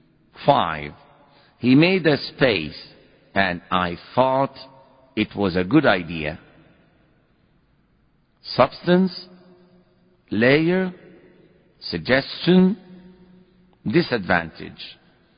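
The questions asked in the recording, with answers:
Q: He made a space, and I thought it was a good idea.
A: C: suggestion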